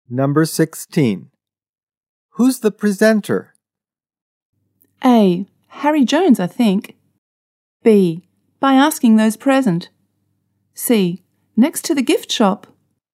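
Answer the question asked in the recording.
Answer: A: Harry Jones, I think.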